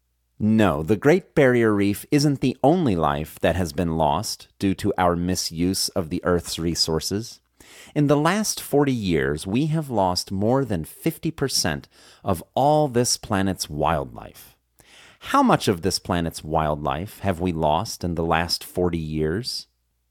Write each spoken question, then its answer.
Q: How much of this planet's wildlife have we lost in the last 40 years?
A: In the last 40 years, we have lost more than 50% of all this planet's wildlife.